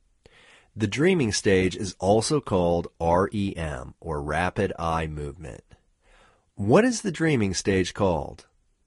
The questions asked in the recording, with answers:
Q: What is the dreaming stage called?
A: The dreaming stage is called REM.